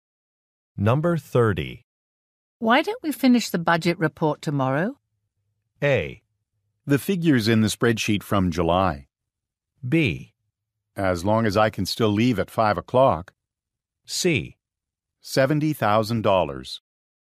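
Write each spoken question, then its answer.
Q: Why don't we finish the budget report tomorrow?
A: B: As long as I can still leave at 5 o'clock.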